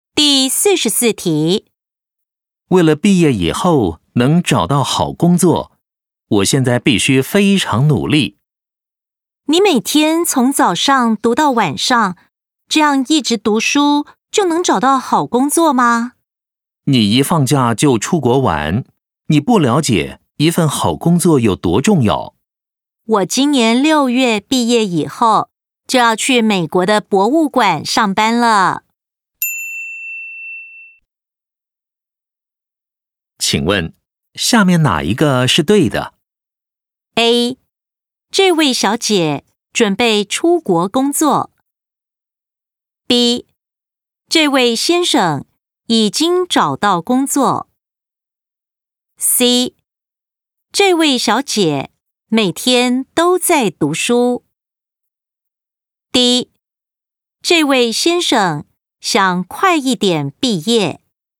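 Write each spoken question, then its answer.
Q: 请问,下面哪一个是对的?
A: A: 这位小姐准备出国工作。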